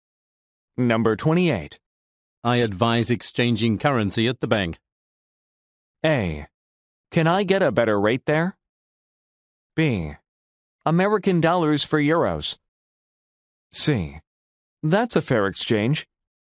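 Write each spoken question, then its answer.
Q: I advise exchanging currency at the bank.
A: A: Can I get a better rate there?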